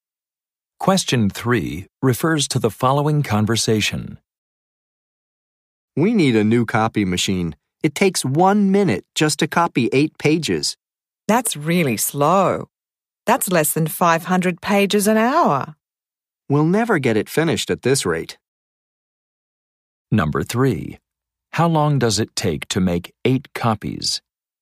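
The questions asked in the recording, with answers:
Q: How long does it take to make 8 copies?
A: 1 minute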